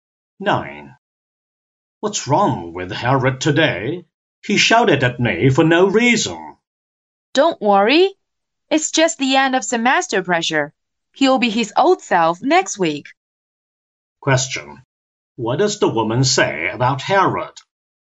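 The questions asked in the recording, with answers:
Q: What does the woman say about Harold?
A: He is stressed by the end of the semester and will soon be back to normal.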